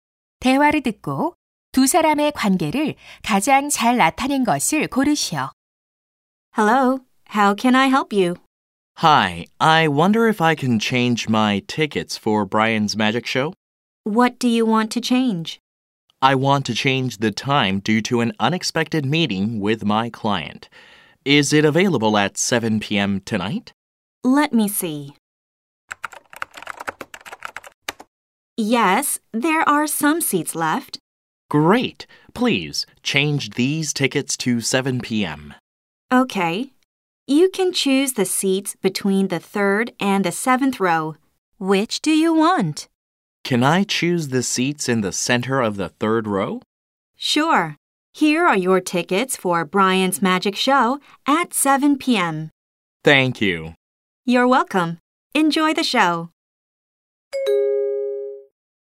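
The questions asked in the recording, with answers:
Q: 대화를 듣고 두 사람의 관계를 가장 잘 나타낸 것을 고르시오.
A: 매표소 직원 - 관객(고객)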